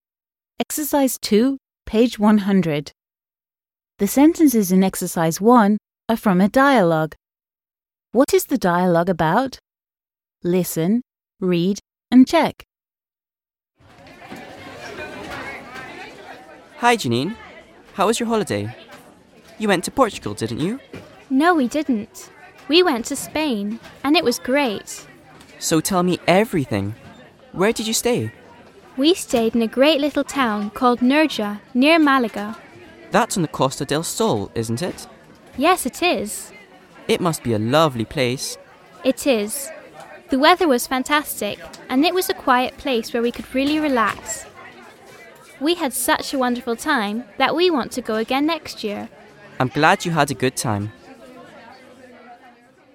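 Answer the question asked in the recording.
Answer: Janine's holiday in Spain (Nerja, near Malaga)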